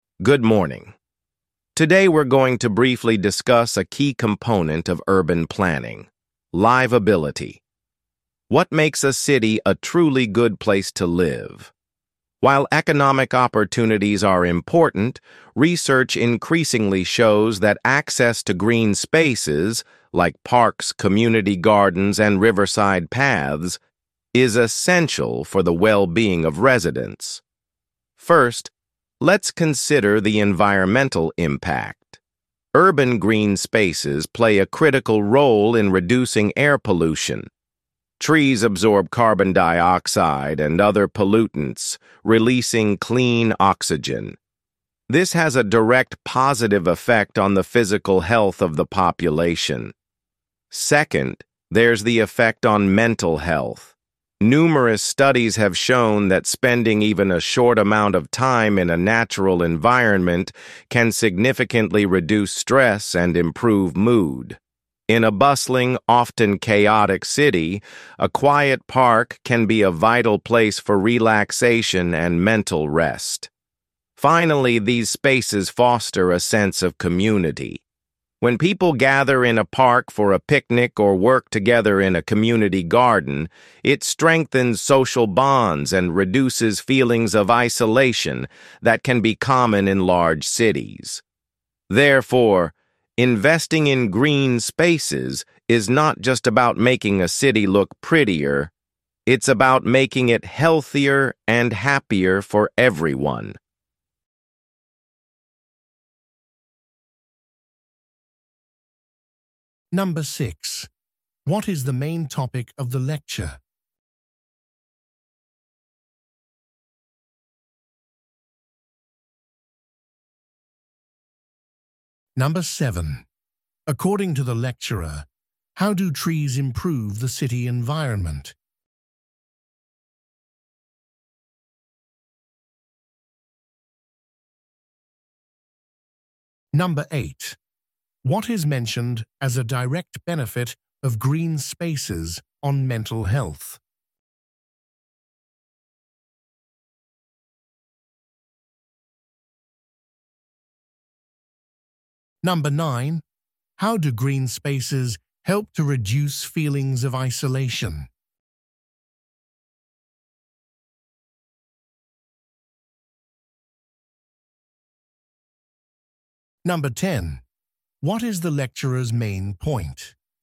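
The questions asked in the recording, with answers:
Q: What is the main topic of the lecture?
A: The importance of urban green spaces for city livability

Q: According to the lecturer, how do trees improve the city environment?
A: They absorb carbon dioxide and pollutants and release clean oxygen

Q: What is mentioned as a direct benefit of green spaces on mental health?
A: They reduce stress and improve mood

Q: How do green spaces help to reduce feelings of isolation?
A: People gather there for picnics or community gardening, strengthening social bonds

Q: What is the lecturer's main point?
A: Investing in green spaces makes cities healthier and happier, not just prettier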